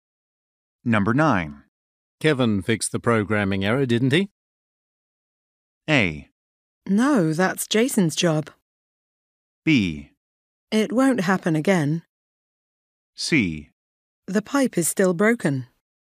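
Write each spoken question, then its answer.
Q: Kevin fixed the programming error, didn't he?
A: A: No, that's Jason's job.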